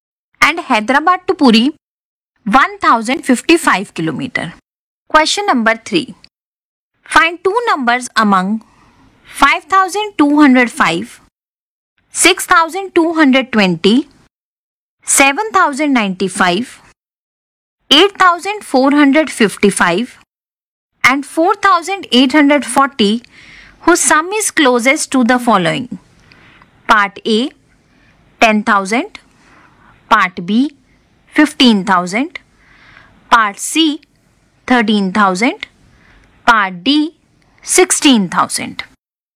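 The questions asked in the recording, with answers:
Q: Part A, 10,000.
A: 5205 and 4840

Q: Part B, 15,000.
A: 6220 and 8455

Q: Part C, 13,000.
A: 4840 and 8455

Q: Part D, 16,000.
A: 7095 and 8455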